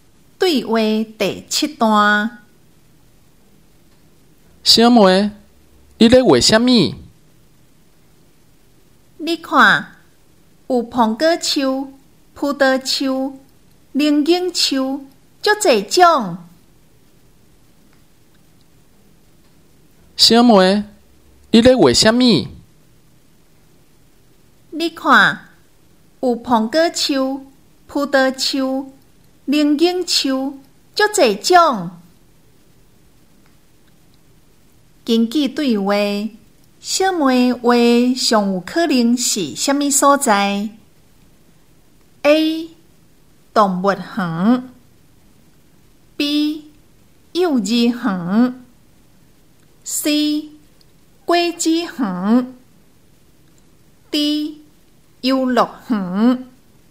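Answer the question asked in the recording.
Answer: C: 果子园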